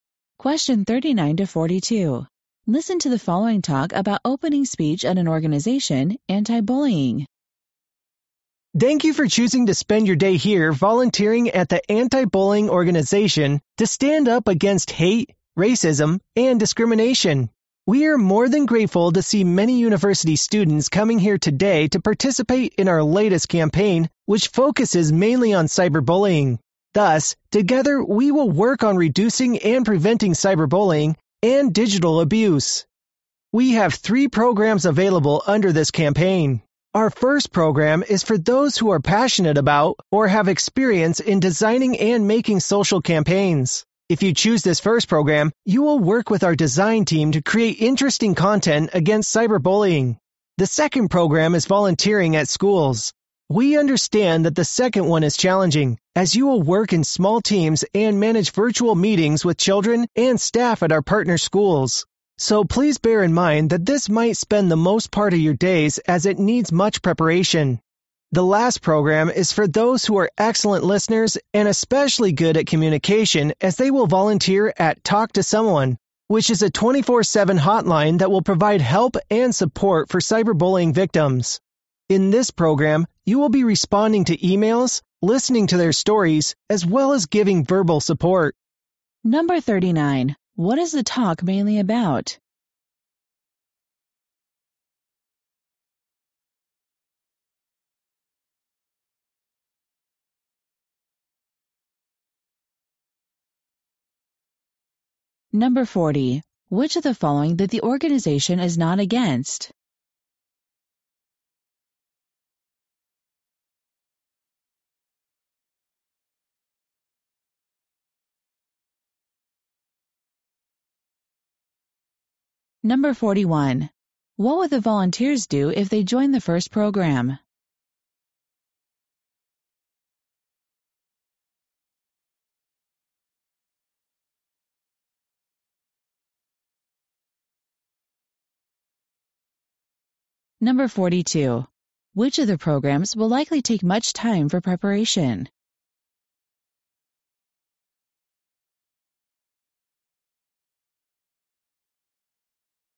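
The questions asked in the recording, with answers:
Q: What is the talk mainly about?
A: Volunteer programs in an anti-cyberbullying campaign

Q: What would the volunteers do if they joined the first program?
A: Work with the design team to create content against cyberbullying

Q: Which of the programs will likely take much time for preparation?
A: Volunteering at schools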